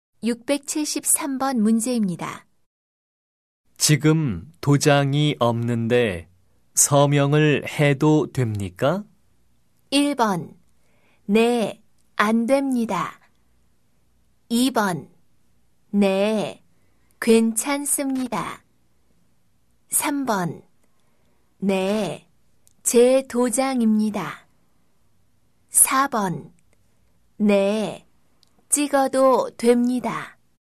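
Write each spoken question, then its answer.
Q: 지금 도장이 없는데 서명을 해도 됩니까?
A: 2: 네, 괜찮습니다.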